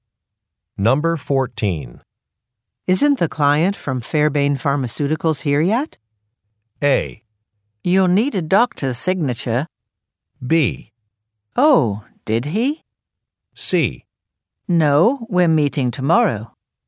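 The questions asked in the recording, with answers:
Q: Isn't the client from Fairbairn Pharmaceuticals here yet?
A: C: No, we're meeting tomorrow.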